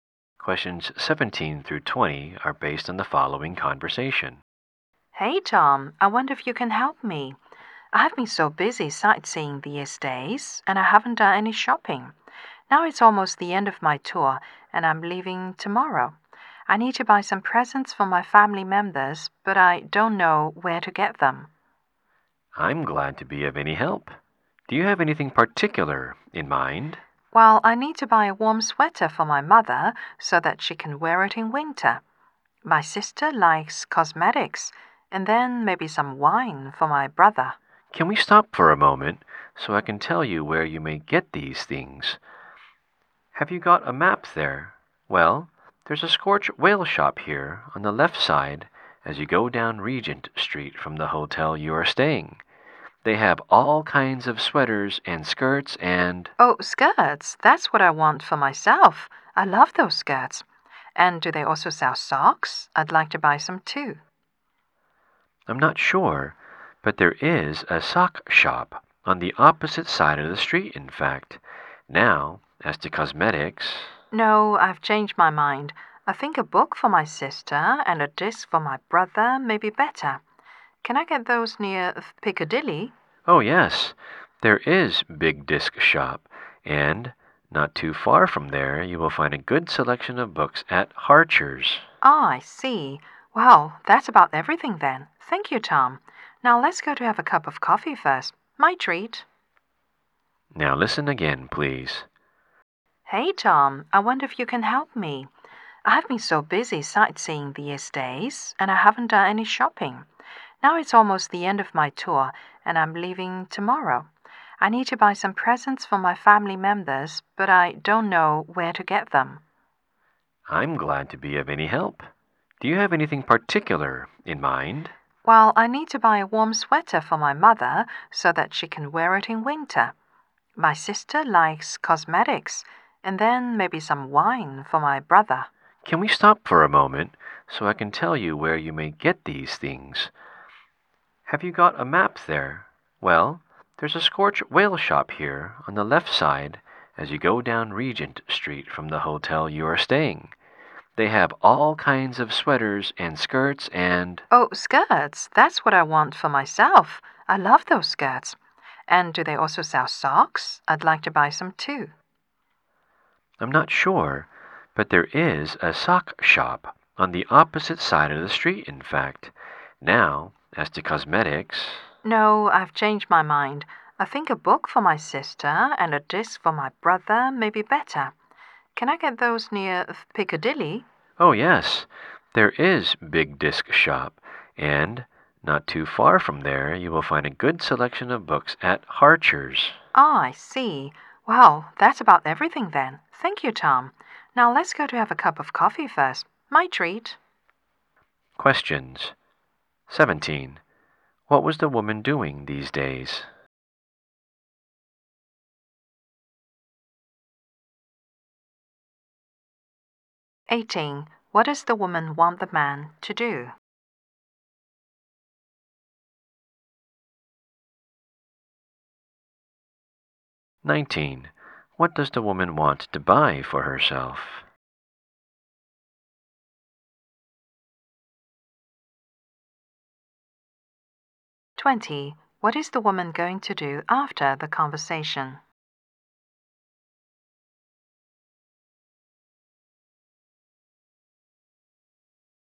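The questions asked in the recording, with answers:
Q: What was the woman doing these days?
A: Sightseeing

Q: What does the woman want the man to do?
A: Tell her where to buy presents

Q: What is the woman going to do after the conversation?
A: Have a cup of coffee with Tom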